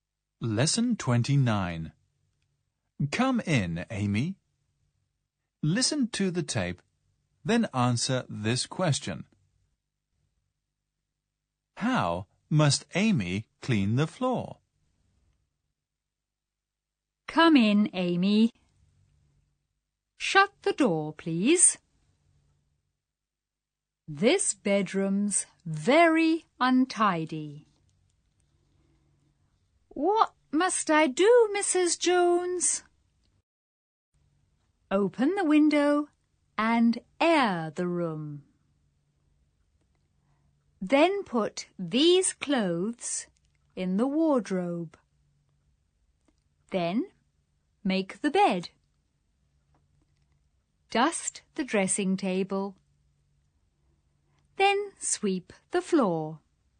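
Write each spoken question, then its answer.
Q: How must Amy clean the floor?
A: She must sweep it.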